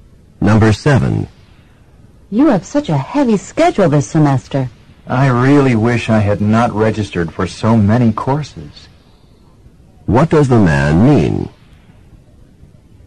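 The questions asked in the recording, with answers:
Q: What does the man mean?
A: He registered for too many courses.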